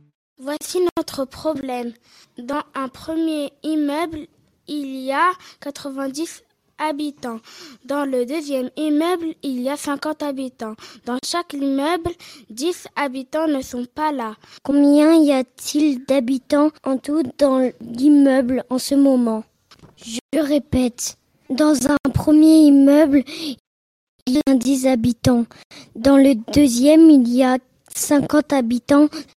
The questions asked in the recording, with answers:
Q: Combien y a-t-il d'habitants en tout dans l'immeuble en ce moment ?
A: 80 plus 40 est égal à 120.